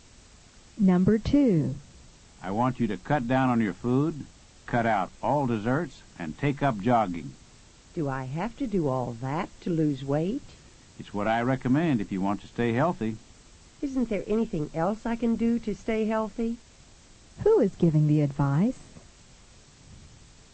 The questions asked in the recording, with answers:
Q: Who is giving the advice?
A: Number 2 is A. A doctor is giving the advice.